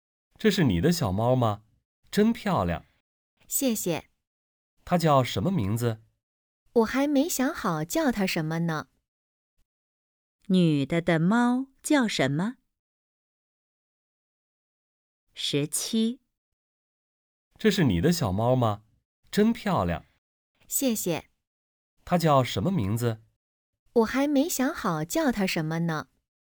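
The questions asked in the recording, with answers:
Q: 女的的猫叫什么?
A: 还没有名字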